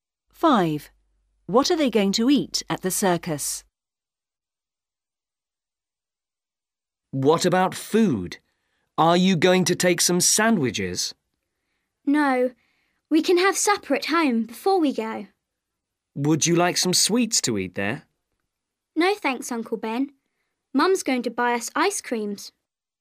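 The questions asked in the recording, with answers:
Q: What are they going to eat at the circus?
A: ice creams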